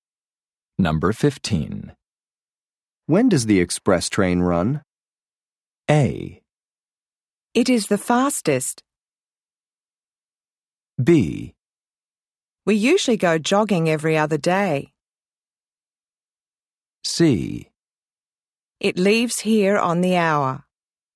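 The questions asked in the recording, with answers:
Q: When does the express train run?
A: C: It leaves here on the hour.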